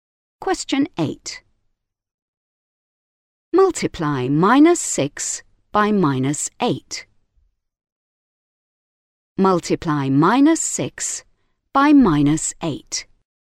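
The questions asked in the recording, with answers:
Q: Multiply minus 6 by minus 8.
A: 48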